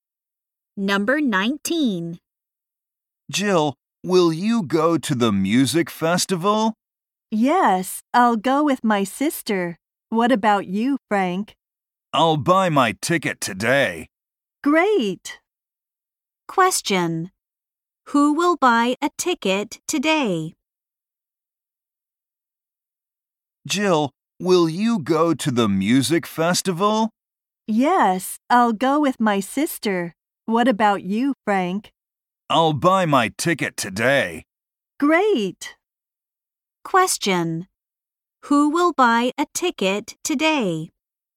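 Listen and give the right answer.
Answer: Frank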